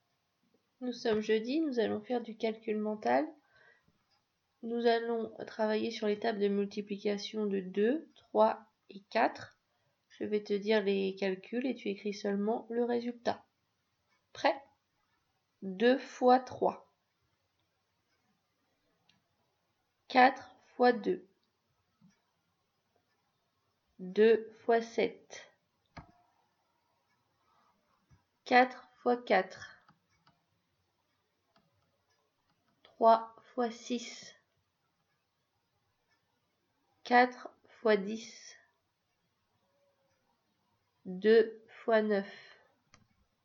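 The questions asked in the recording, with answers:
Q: 2 fois 7.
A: 14

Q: 4 fois 4.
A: 16

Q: 3 fois 6.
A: 18

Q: 4 fois 10.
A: 40

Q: 2 fois 9.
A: 18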